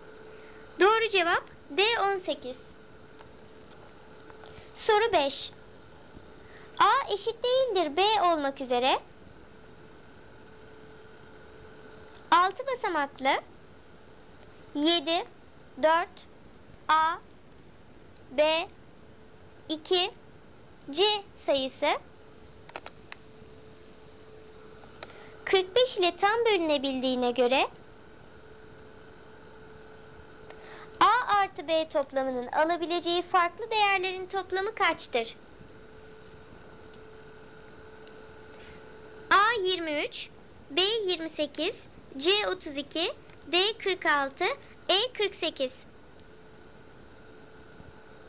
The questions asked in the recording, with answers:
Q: A artı B toplamının alabileceği farklı değerlerin toplamı kaçtır?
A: Doğru cevap B28.